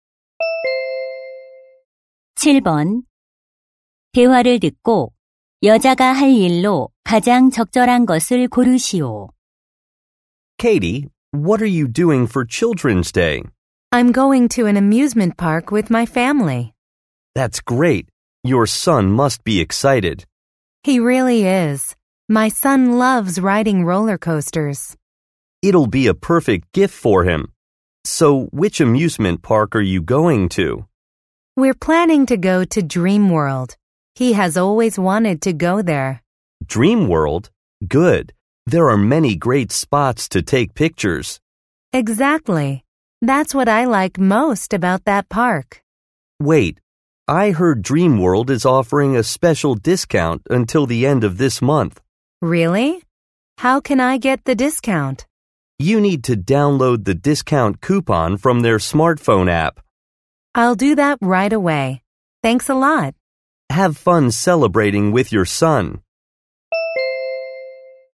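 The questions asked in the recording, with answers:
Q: 대화를 듣고 여자가 할 일로 가장 적절한 것을 고르시오.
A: 스마트폰 앱에서 할인 쿠폰 다운로드하기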